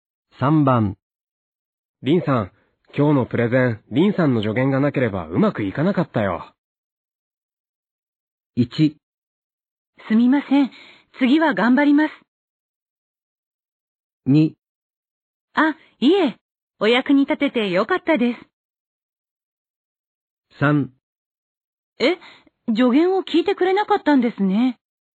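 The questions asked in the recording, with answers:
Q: リンさん。今日のプレゼン、リンさんの助言がなければうまくいかなかったよ。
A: 2: あ、いえ。お役に立ててよかったです。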